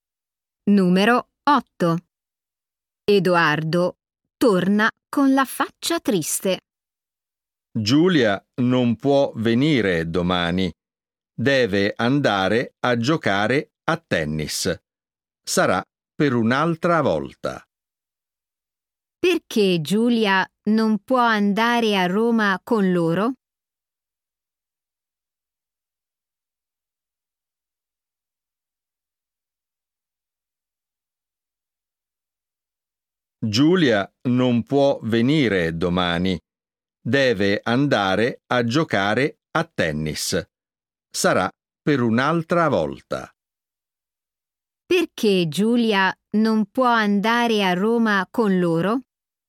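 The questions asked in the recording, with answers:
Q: Perché Giulia non può andare a Roma con loro?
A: deve andare a giocare a tennis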